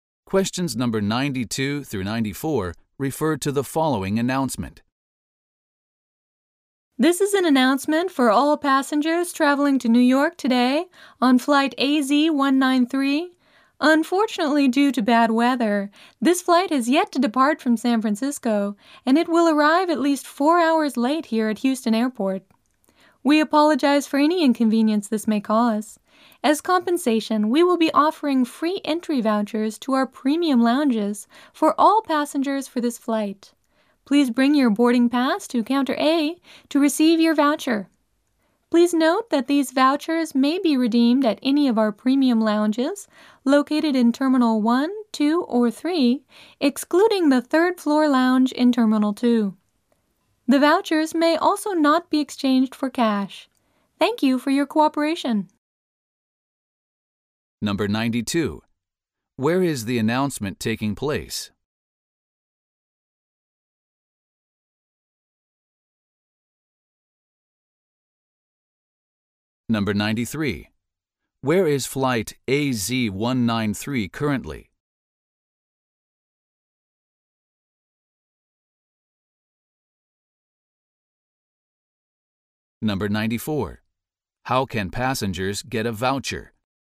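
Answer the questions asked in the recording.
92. At Houston Airport
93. In San Francisco
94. By bringing their boarding pass to Counter A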